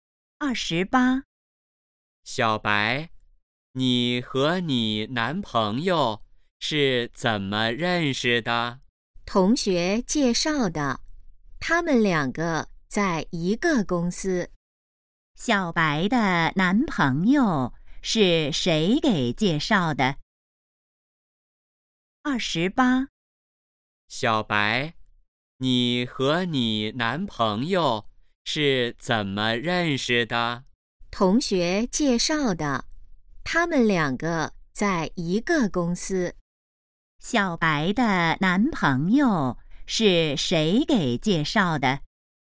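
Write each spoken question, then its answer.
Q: 小白的男朋友是谁给介绍的?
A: 同学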